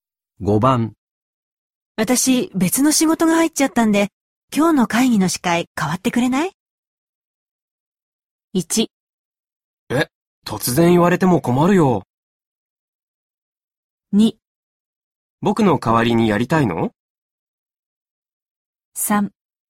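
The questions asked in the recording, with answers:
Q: 私、別の仕事が入っちゃったんで、今日の会議の司会変わってくれない?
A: 1: え、突然言われても困るよ。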